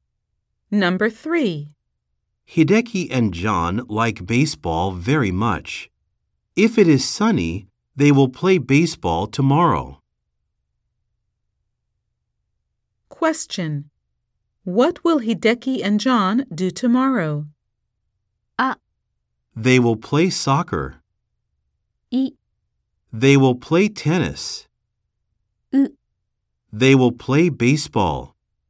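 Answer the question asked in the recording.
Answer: C: They will play baseball.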